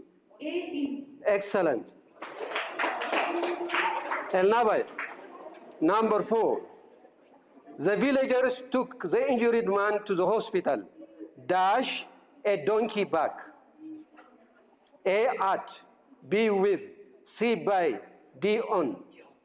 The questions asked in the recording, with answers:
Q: The villagers took the injured man to the hospital.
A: D on.